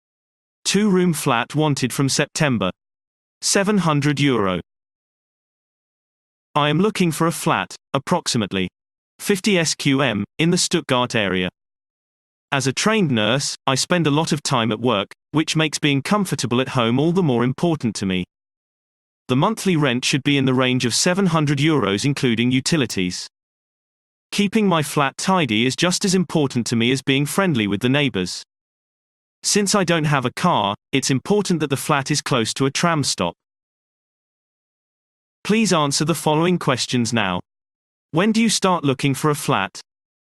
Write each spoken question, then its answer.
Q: When do you start looking for a flat?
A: Response. The flat is wanted from September.